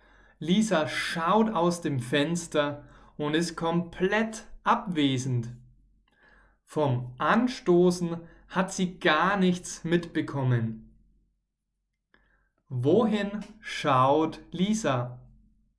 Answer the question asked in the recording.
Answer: Aus dem Fenster. Sie schaut oder sie guckt aus dem Fenster.